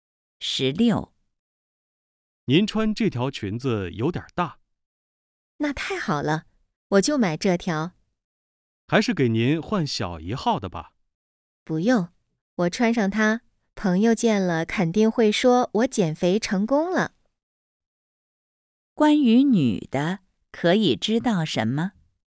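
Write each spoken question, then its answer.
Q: 关于女的,可以知道什么?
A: 她要买那条偏大的裙子,想让朋友以为她减肥成功了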